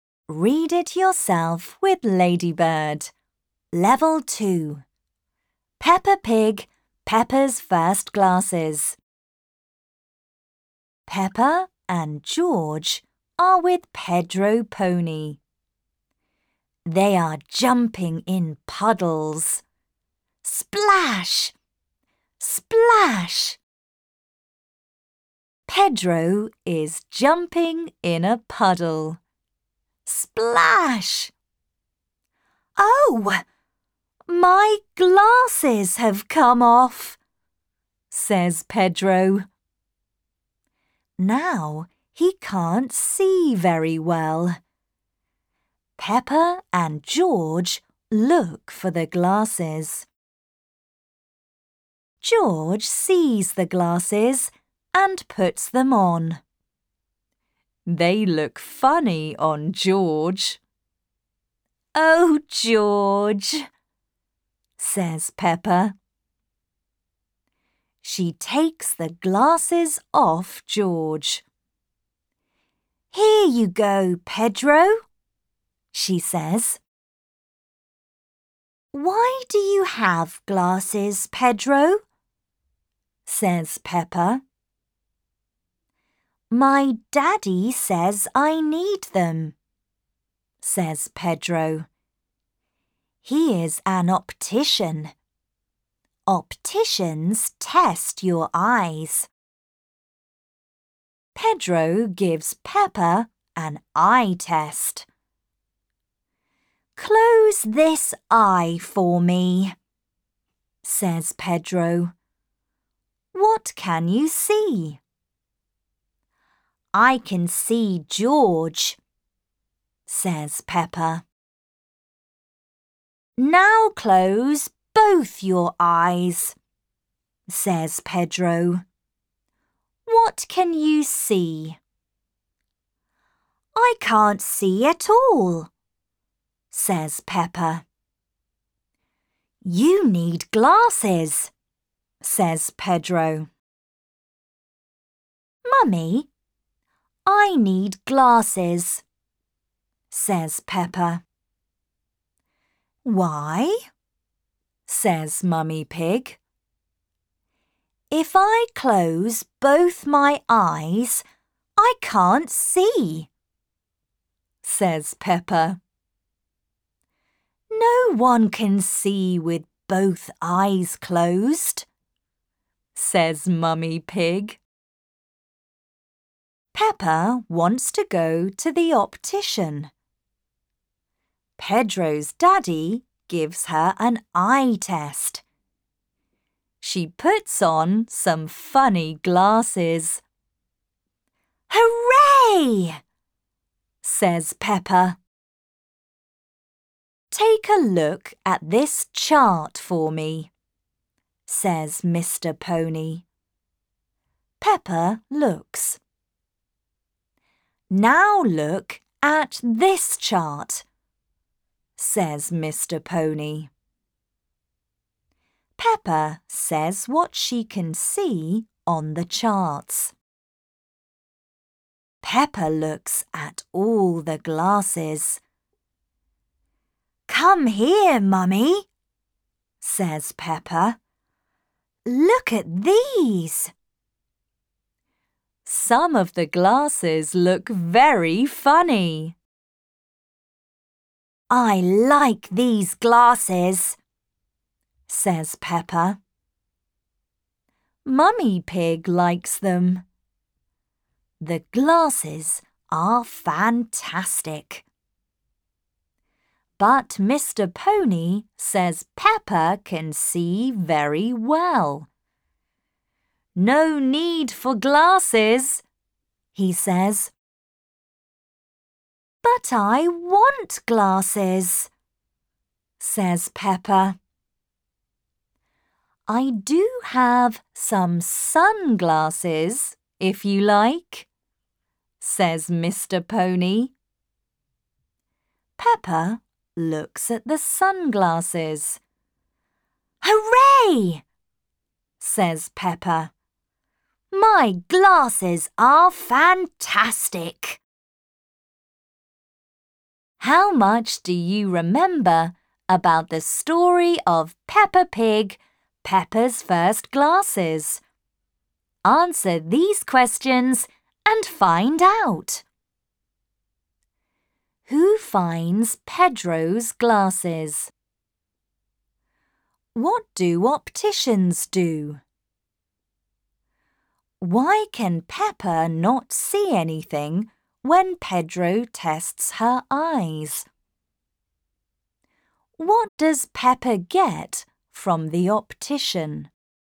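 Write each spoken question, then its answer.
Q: Who finds Pedro's glasses?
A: George

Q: What do opticians do?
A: They test your eyes

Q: Why can Peppa not see anything when Pedro tests her eyes?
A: Because she closes both her eyes

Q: What does Peppa get from the optician?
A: Sunglasses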